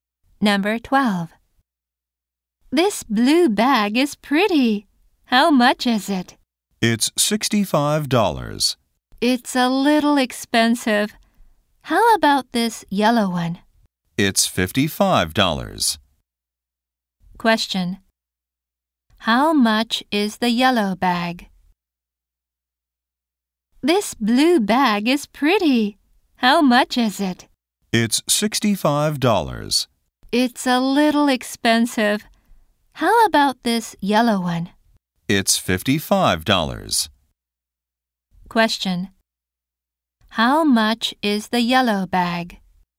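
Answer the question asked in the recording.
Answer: $55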